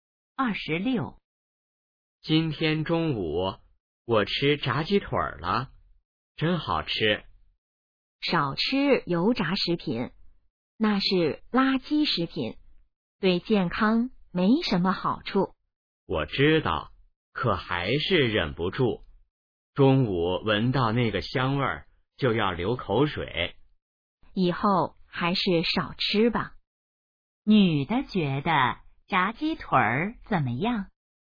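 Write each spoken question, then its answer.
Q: 女的觉得炸鸡腿儿怎么样?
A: 是垃圾食品,对健康不好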